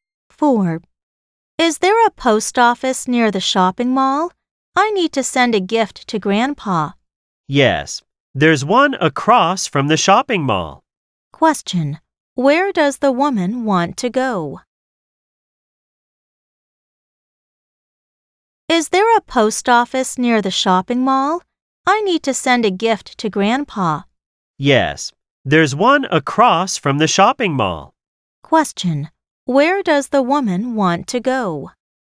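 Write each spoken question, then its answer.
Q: Where does the woman want to go?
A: The post office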